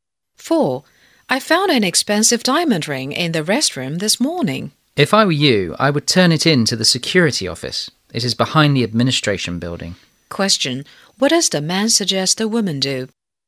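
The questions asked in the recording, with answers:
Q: What does the man suggest the woman do?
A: Turn the ring in to the security office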